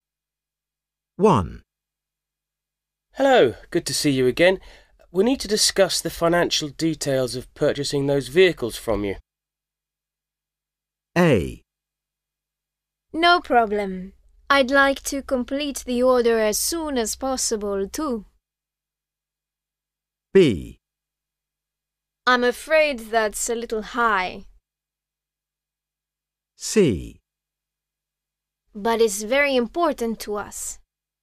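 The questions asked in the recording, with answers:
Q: Hello, good to see you again. We need to discuss the financial details of purchasing those vehicles from you.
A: A: No problem. I'd like to complete the order as soon as possible, too.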